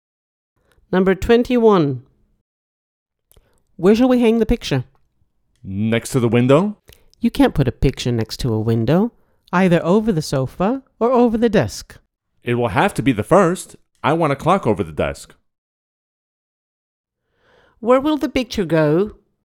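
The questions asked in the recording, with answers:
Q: Where will the picture go?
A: Over the sofa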